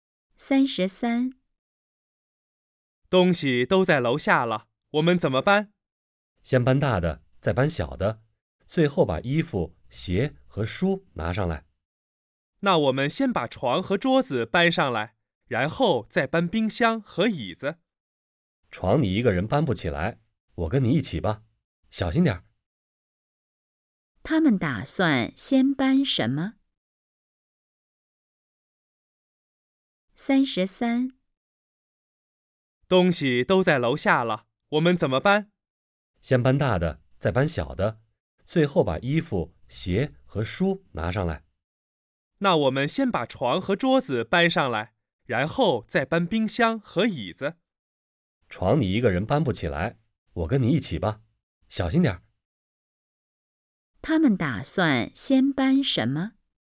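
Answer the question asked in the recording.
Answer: 床和桌子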